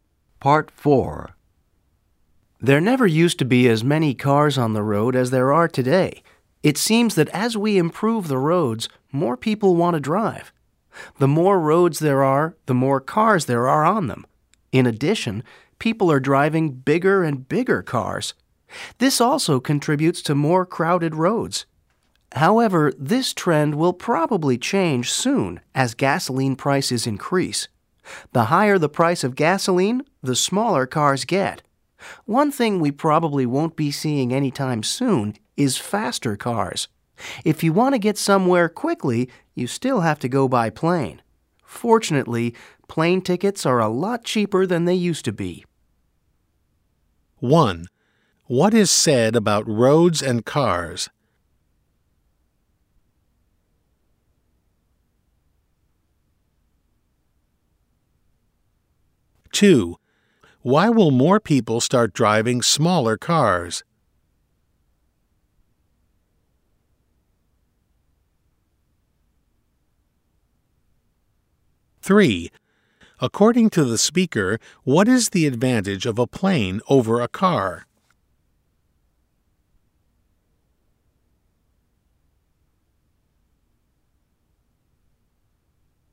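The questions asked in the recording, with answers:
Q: What is said about roads and cars?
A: The more roads there are, the more cars there are on them

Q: Why will more people start driving smaller cars?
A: Because gasoline prices are increasing

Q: According to the speaker, what is the advantage of a plane over a car?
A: It is faster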